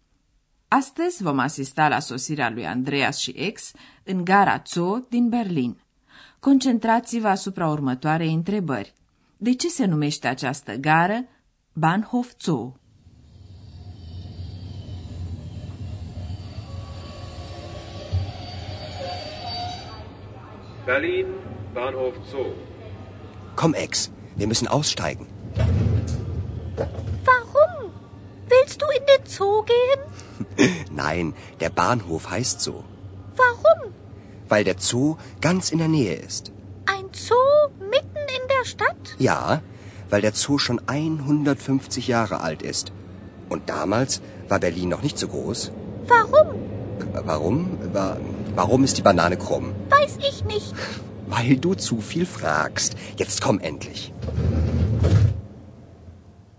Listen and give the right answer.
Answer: Gara se numește Zoo pentru că se află în imediata vecinătate a grădinii zoologice, căreia îi se spune prescurtat Zoo.